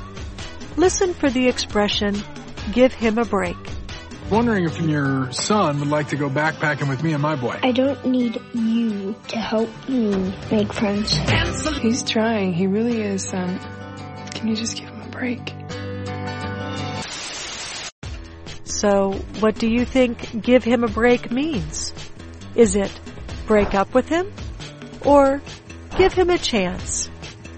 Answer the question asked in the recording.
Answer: Give him a break means give him a chance.